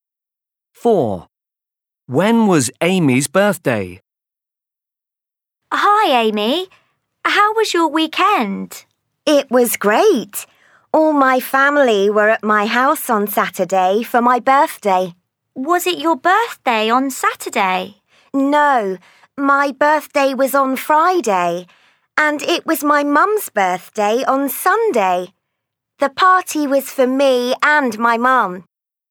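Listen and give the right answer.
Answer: On Friday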